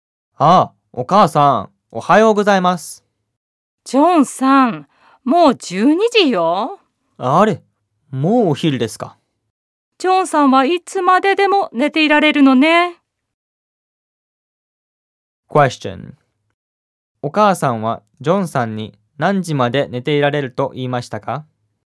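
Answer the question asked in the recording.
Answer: いつまででも寝ていられる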